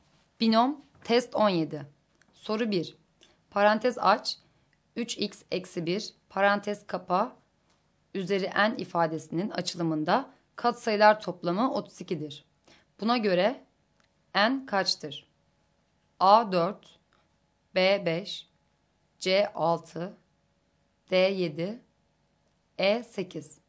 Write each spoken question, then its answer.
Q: Buna göre n kaçtır?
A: Doğru cevap B şıkkı.